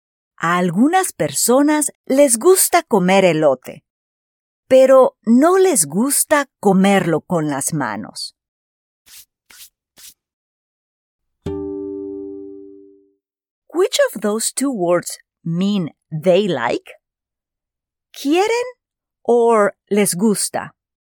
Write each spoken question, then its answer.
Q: Which of those two words mean they like?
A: Correcto. Les gusta means they like.